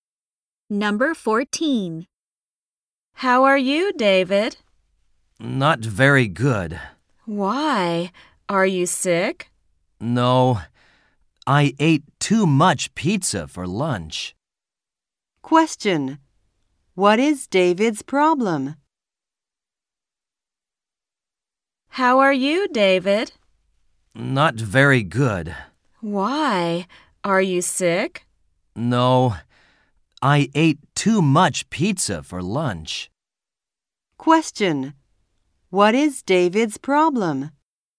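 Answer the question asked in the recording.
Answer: He ate too much pizza for lunch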